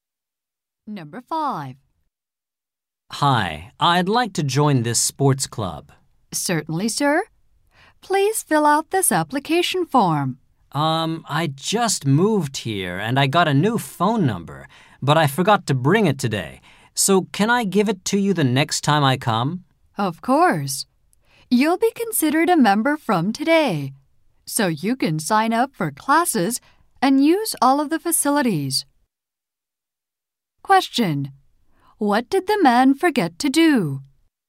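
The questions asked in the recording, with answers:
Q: What did the man forget to do?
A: Bring his new phone number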